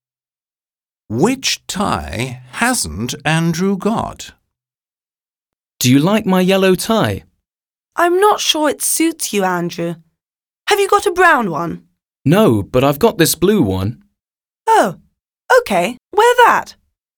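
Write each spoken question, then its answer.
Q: Which tie hasn't Andrew got?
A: A brown tie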